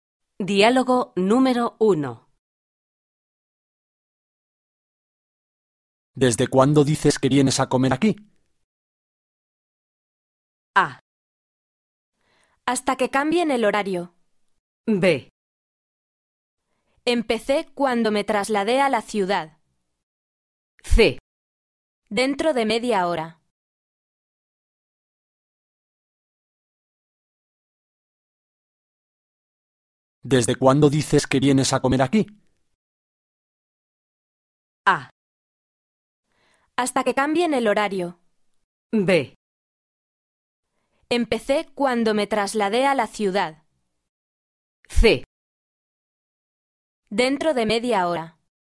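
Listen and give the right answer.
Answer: B: Empecé cuando me trasladé a la ciudad.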